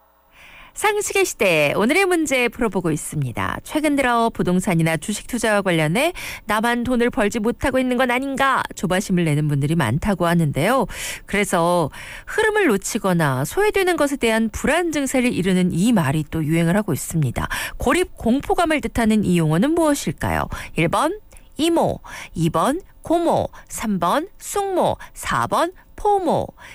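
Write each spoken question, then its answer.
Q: 고립 공포감을 뜻하는 이 용어는 무엇일까요?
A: 4: 포모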